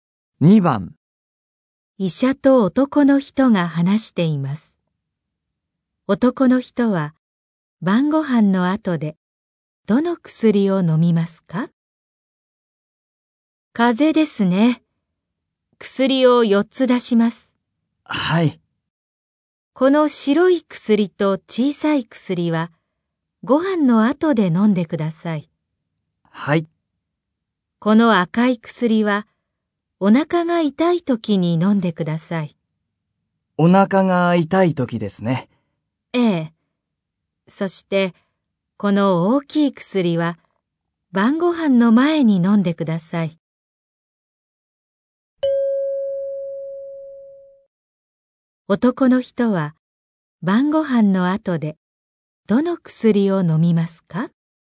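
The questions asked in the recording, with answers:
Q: 男の人は、晩ご飯の後で、どの薬を飲みますか?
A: 白い薬と小さい薬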